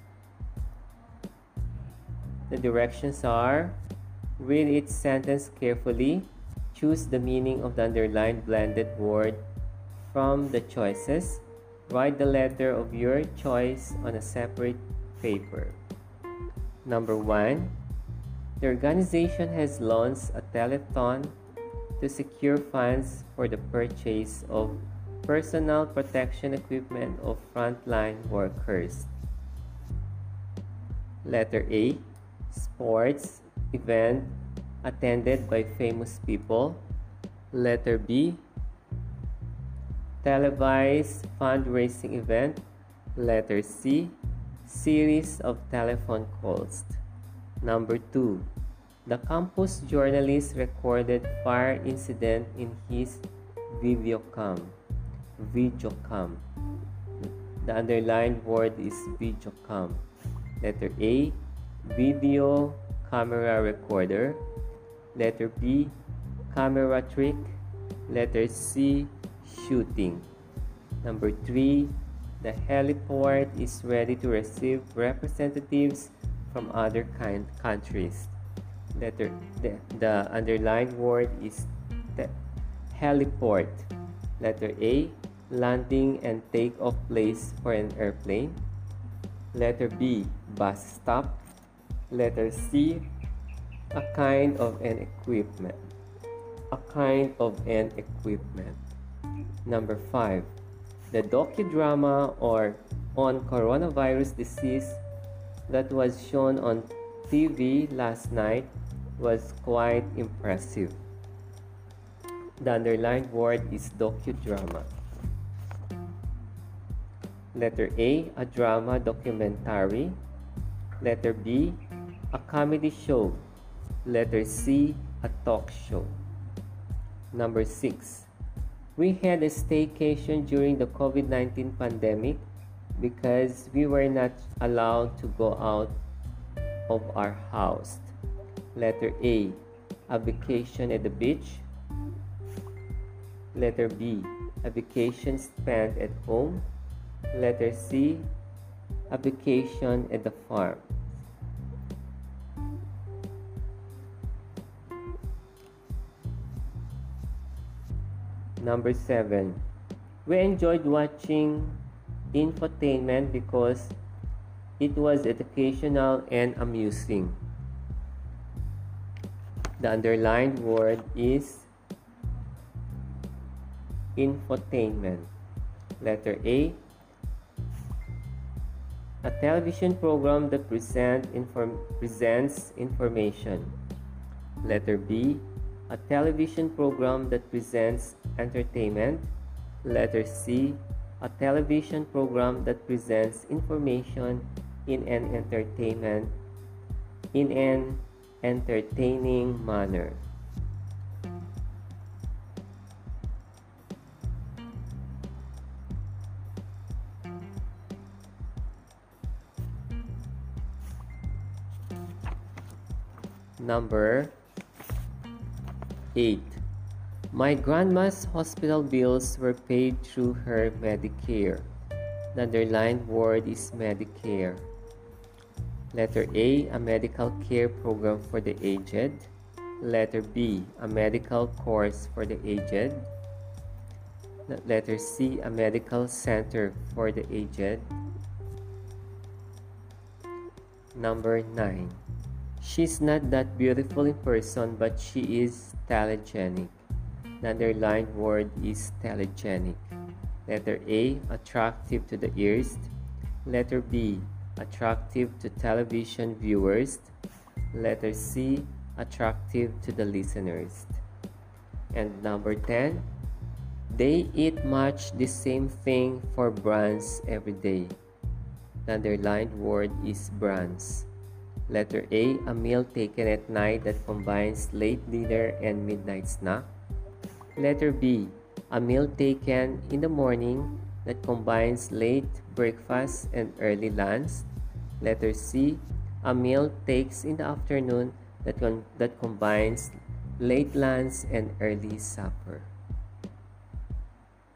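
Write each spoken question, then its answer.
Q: Number 1. The organization has launched a telethon to secure funds for the purchase of personal protection equipment of frontline workers.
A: B: Televised fundraising event

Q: Number 2. The campus journalist recorded fire incident in his videocom.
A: A: Video camera recorder

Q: The docudrama on coronavirus disease that was shown on TV last night was quite impressive.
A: A: A drama documentary

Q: Number 6. We had a staycation during the COVID-19 pandemic because we were not allowed to go out of our house.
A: B: A vacation spent at home

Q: Number 7. We enjoyed watching infotainment because it was educational and amusing.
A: C: A television program that presents information in an entertaining manner

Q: Number 8. My grandma's hospital bills were paid through her Medicare.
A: A: a medical care program for the aged

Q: Number 9. She's not that beautiful in person, but she is telegenic.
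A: B: attractive to television viewers

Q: And number 10, they eat much the same thing for brunch every day.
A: B: a meal taken in the morning that combines late breakfast and early lunch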